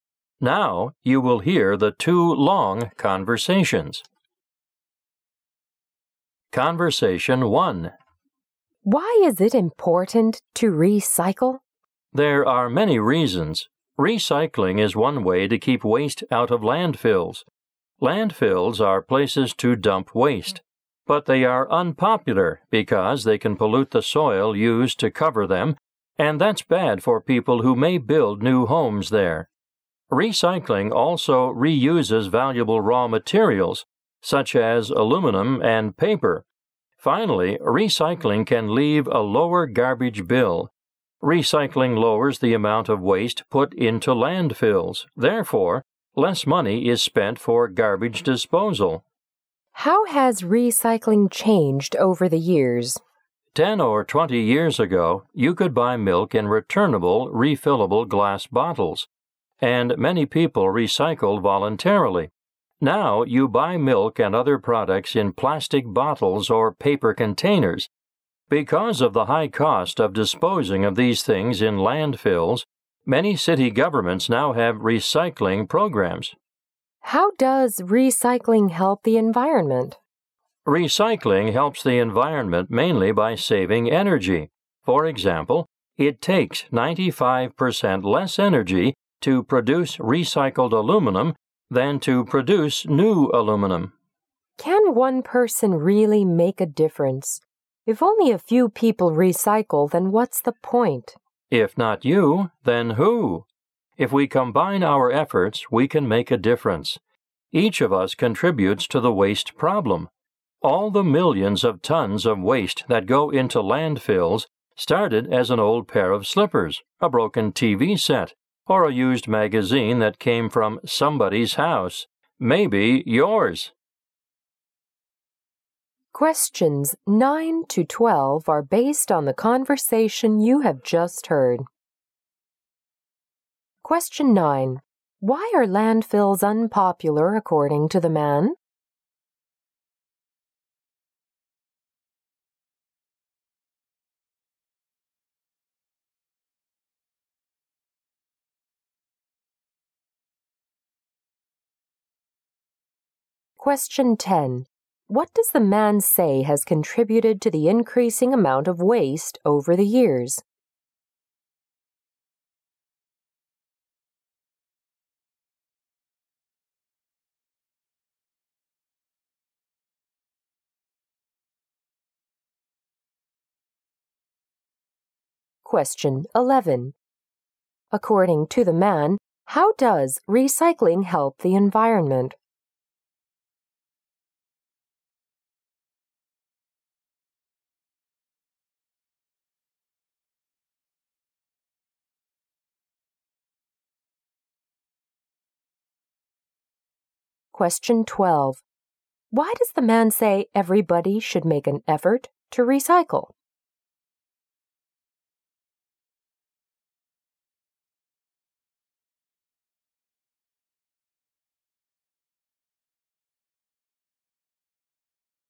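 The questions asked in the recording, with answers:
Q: Why are landfills unpopular according to the man?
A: They can pollute the soil used to cover them.

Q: What does the man say has contributed to the increasing amount of waste over the years?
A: Products now come in plastic bottles or paper containers instead of refillable glass bottles.

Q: According to the man, how does recycling help the environment?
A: Mainly by saving energy.

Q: Why does the man say everybody should make an effort to recycle?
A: Everyone contributes to the waste problem, and together we can make a difference.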